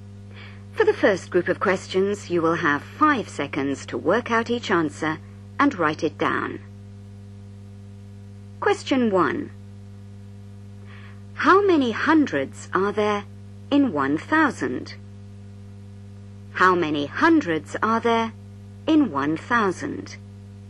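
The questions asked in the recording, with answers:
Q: How many hundreds are there in 1,000?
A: 10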